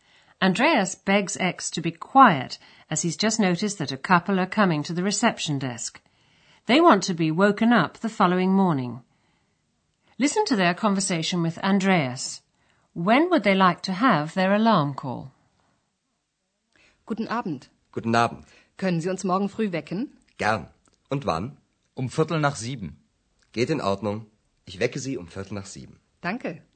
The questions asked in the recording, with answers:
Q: When would they like to have their alarm call?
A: Then they say they'd like to be woken at 7:15.